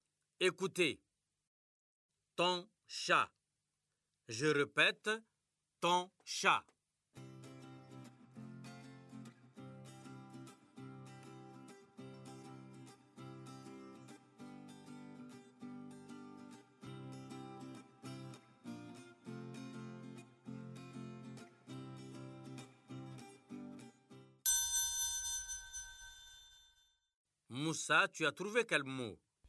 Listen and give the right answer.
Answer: Monsieur, c'est chaton.